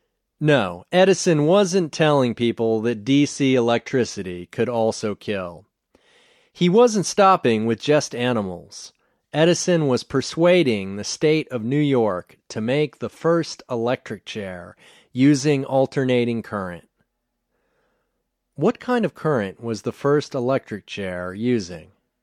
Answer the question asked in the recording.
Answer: The first electric chair was using alternating current.